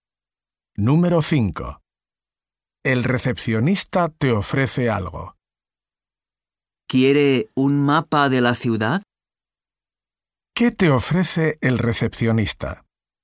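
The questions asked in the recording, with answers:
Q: ¿Qué te ofrece el recepcionista?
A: Un mapa de la ciudad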